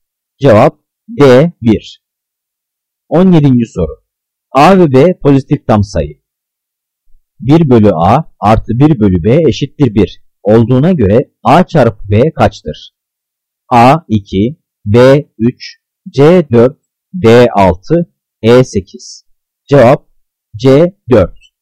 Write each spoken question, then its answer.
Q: 1 bölü A artı 1 bölü B eşittir 1 olduğuna göre A çarpı B kaçtır?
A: Cevap C 4.